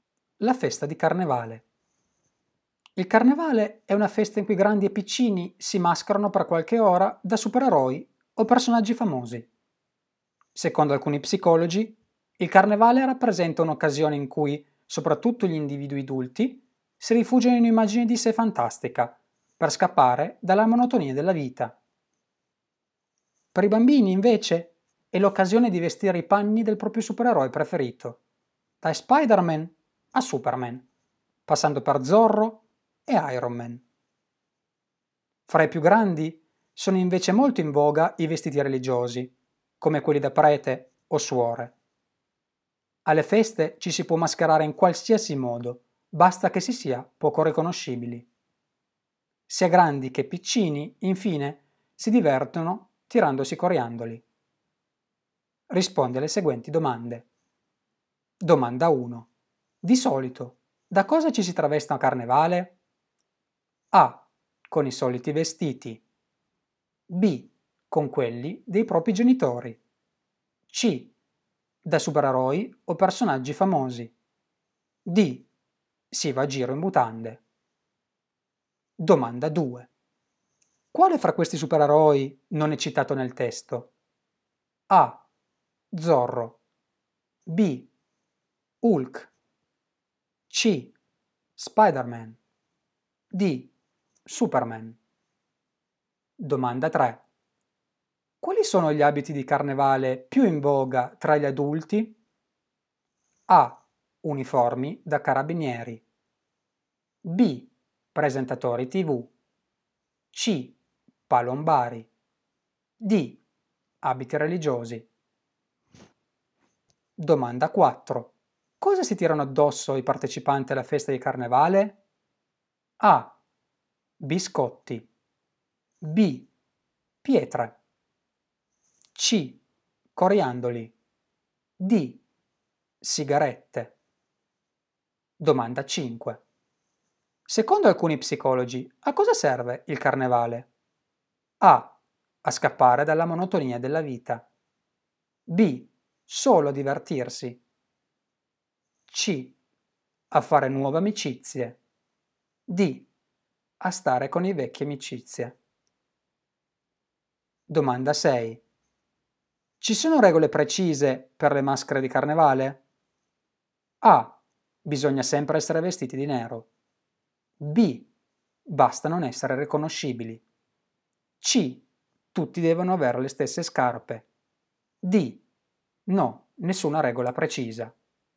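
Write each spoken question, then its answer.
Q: Di solito, da cosa ci si traveste a Carnevale?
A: C: Da supereroi o personaggi famosi.

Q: Quale fra questi supereroi non è citato nel testo?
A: B: Hulk.

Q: Quali sono gli abiti di carnevale più in voga tra gli adulti?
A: D: Abiti religiosi.

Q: Cosa si tirano addosso i partecipanti alla festa di carnevale?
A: C: Coriandoli.

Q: Secondo alcuni psicologi, a cosa serve il carnevale?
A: A: A scappare dalla monotonia della vita.

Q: Ci sono regole precise per le maschere di carnevale?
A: B: Basta non essere riconoscibili.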